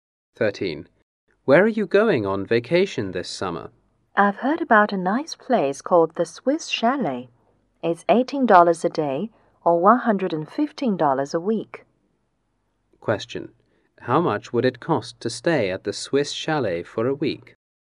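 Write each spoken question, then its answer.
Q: How much would it cost to stay at the Swiss Chalet for a week?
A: $115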